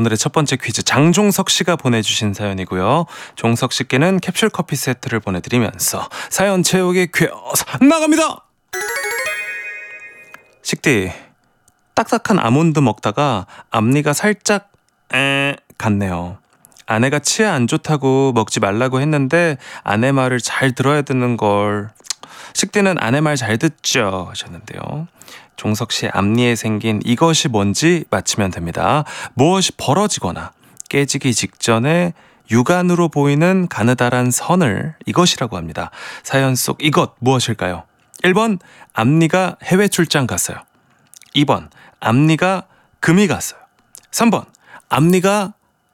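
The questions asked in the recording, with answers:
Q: 사연 속 이것 무엇일까요?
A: 2번: 앞니가 금이 갔어요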